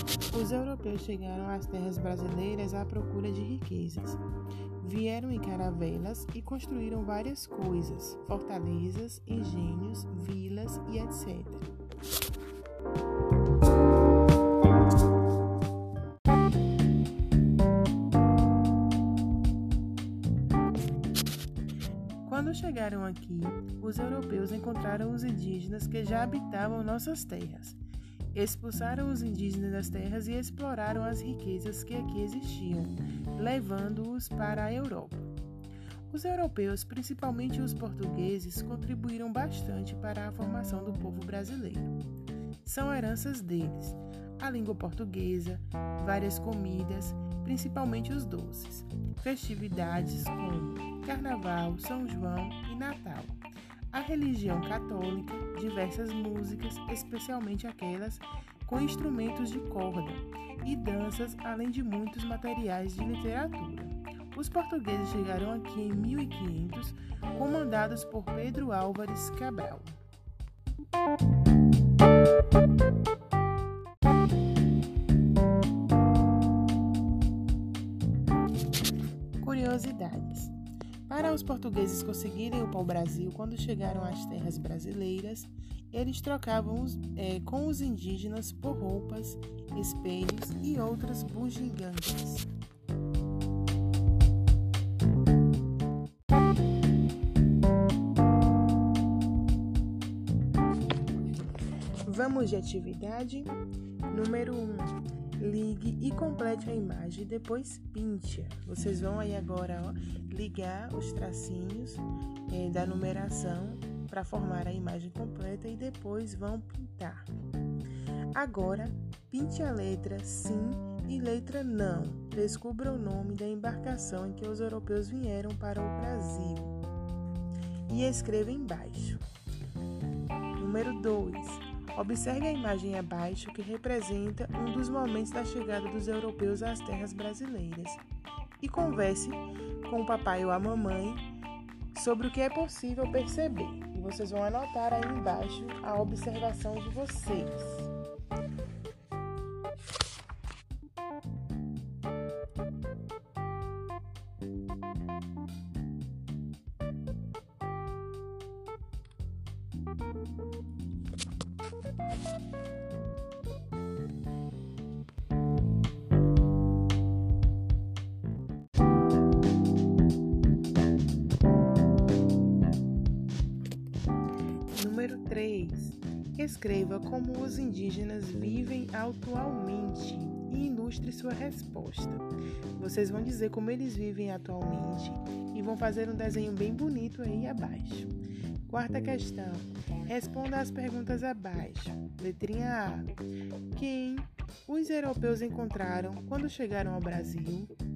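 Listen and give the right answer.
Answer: Os indígenas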